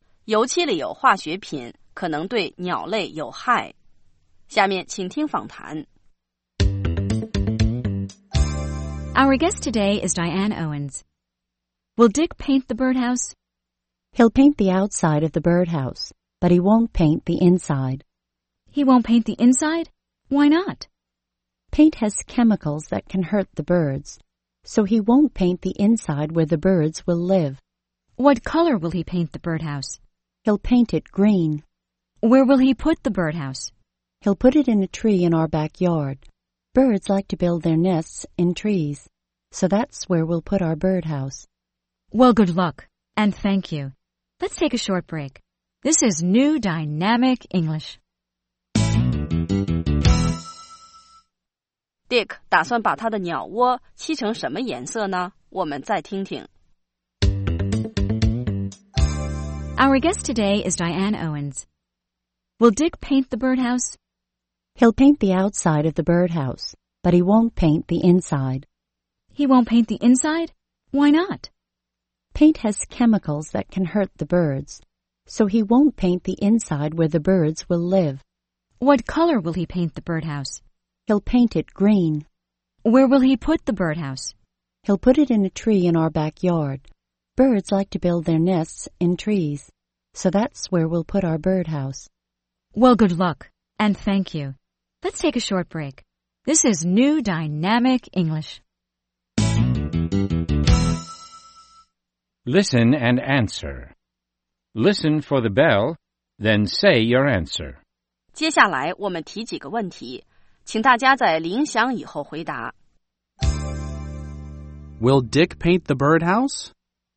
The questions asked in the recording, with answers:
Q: Will Dick paint the birdhouse?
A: He'll paint the outside, but he won't paint the inside.